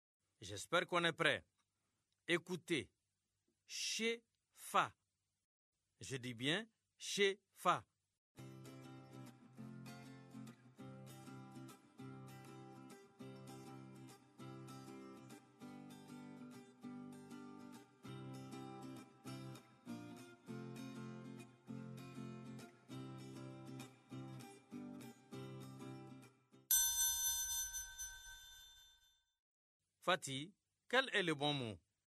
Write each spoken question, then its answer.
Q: Fatih, quel est le bon mot?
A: Fâché.